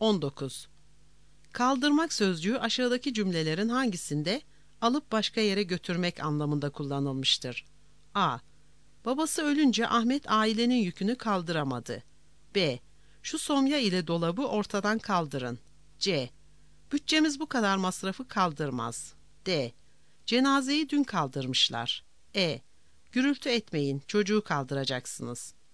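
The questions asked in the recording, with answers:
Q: Kaldırmak sözcüğü aşağıdaki cümlelerin hangisinde alıp başka yere götürmek anlamında kullanılmıştır?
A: B: Şu somya ile dolabı ortadan kaldırın.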